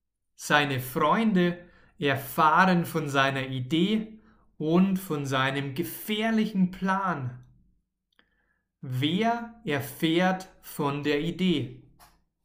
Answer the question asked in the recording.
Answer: seine Freunde. Seine Freunde erfahren von der Idee.